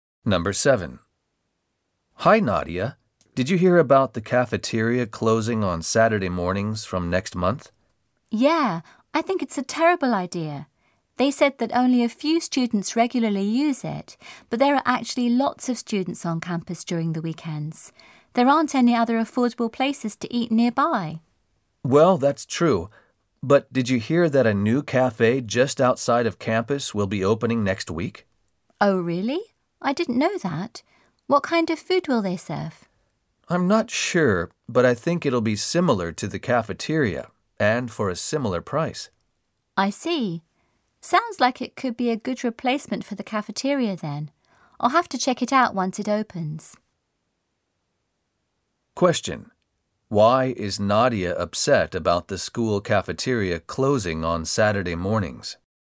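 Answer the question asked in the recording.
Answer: Many students are on campus at weekends and there are no other affordable places to eat nearby.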